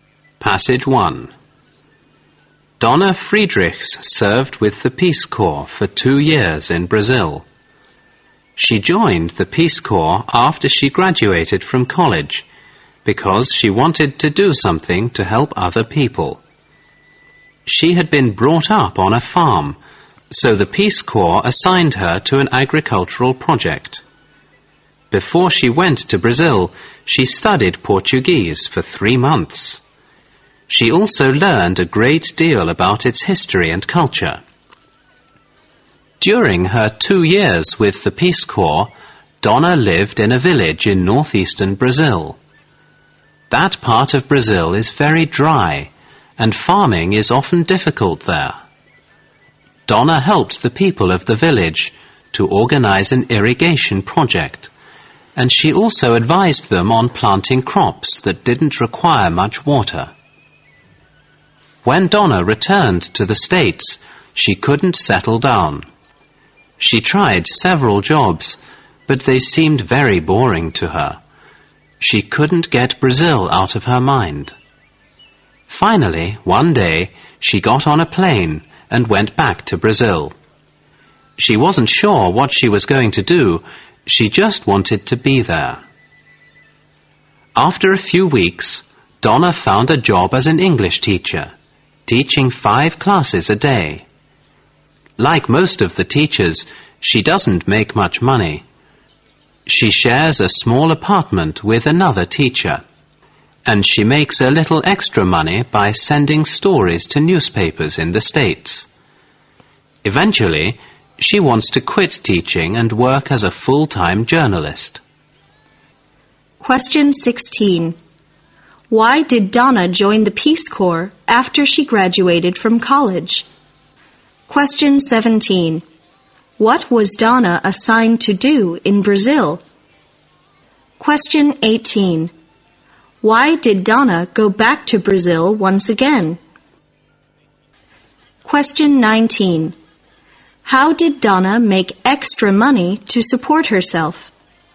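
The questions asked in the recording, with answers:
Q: Why did Donna join the Peace Corps after she graduated from college?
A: Because she wanted to do something to help other people.

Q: What was Donna assigned to do in Brazil?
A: To work on an agricultural project.

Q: Why did Donna go back to Brazil once again?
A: She couldn't get Brazil out of her mind; she just wanted to be there.

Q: How did Donna make extra money to support herself?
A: By sending stories to newspapers in the States.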